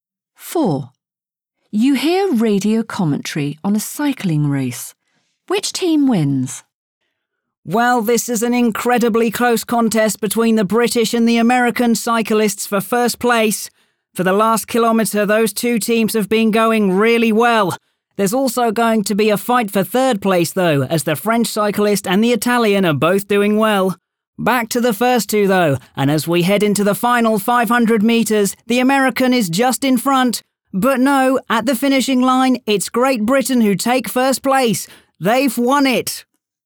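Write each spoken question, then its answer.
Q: Which team wins?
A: Great Britain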